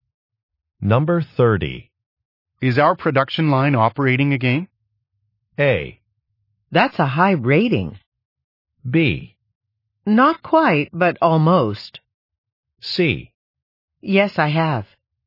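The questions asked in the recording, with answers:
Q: Is our production line operating again?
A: B: Not quite, but almost.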